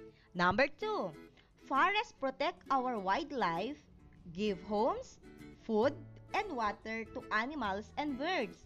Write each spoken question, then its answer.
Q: forests protect our wildlife, give homes, food, and water to animals and birds.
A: Exactly, it is a fact.